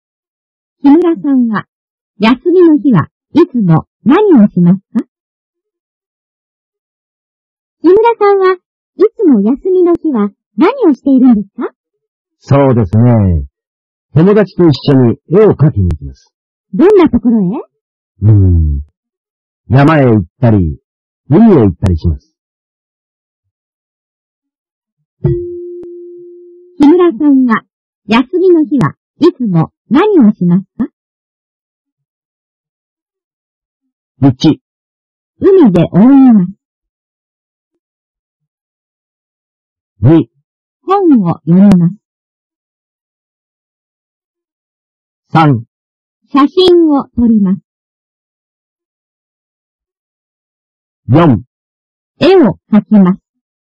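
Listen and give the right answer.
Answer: 4: 絵を描きます。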